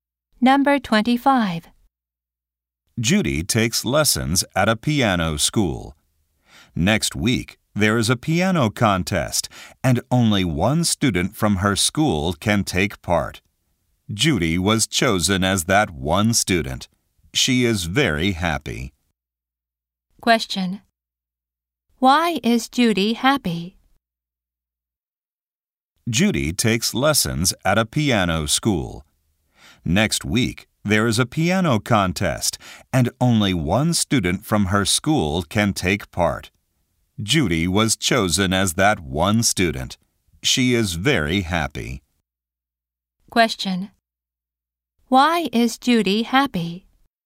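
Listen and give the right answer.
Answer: She was chosen for the piano contest.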